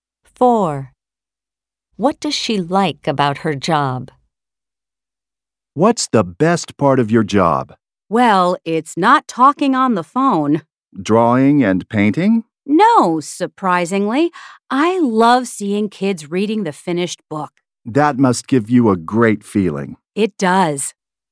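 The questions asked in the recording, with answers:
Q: What does she like about her job?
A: Seeing kids reading the finished book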